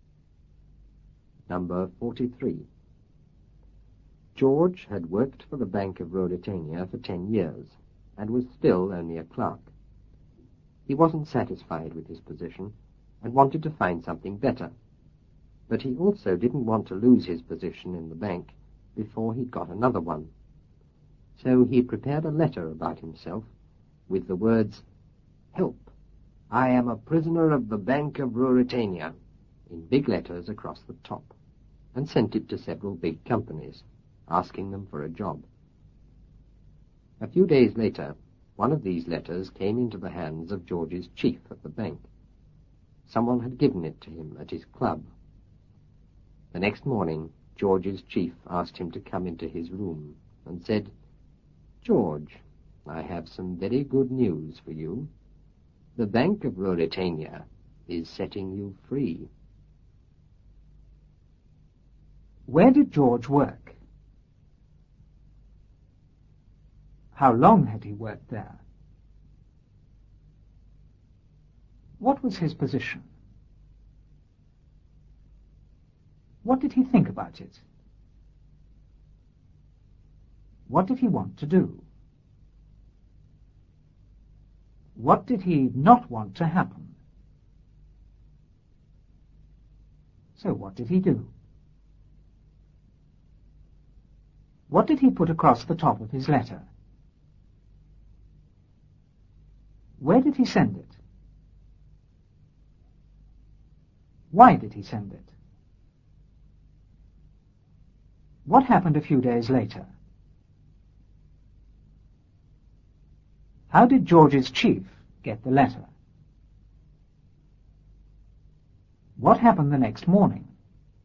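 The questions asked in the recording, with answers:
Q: Where did George work?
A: At the Bank of Ruritania

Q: How long had he worked there?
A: 10 years

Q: What was his position?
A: A clerk

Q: What did he think about it?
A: He wasn't satisfied with it

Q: What did he want to do?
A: Find something better

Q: What did he not want to happen?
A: To lose his position in the bank before he'd got another one

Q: So what did he do?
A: He prepared a letter about himself and sent it to several big companies

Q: What did he put across the top of his letter?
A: "Help, I am a prisoner of the Bank of Ruritania"

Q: Where did he send it?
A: To several big companies

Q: Why did he send it?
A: To ask them for a job

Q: What happened a few days later?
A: One of the letters came into the hands of George's chief

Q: How did George's chief get the letter?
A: Someone gave it to him at his club

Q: What happened the next morning?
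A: George's chief asked him to come into his room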